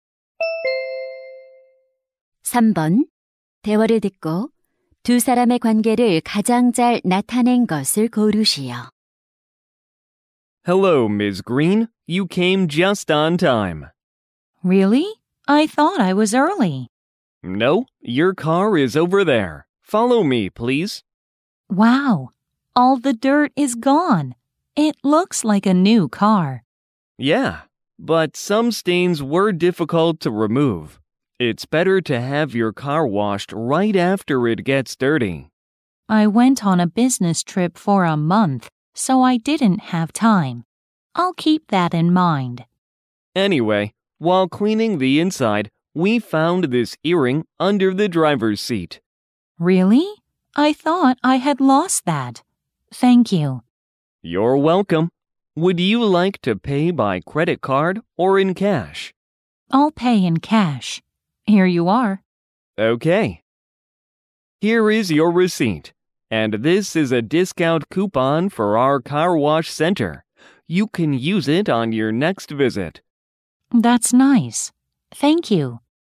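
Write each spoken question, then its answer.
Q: 대화를 듣고 두 사람의 관계를 가장 잘 나타낸 것을 고르시오.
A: 세차장 직원 - 고객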